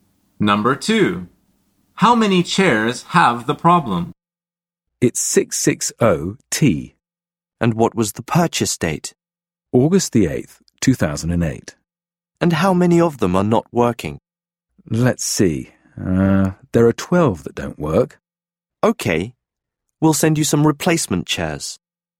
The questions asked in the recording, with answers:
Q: How many chairs have the problem?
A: The answer is 12.